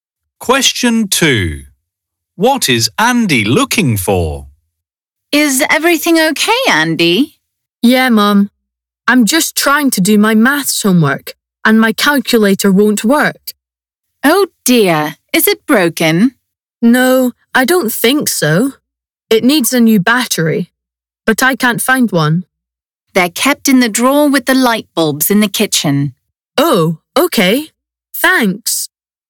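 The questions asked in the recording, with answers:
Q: What is Andy looking for?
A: A battery for his calculator.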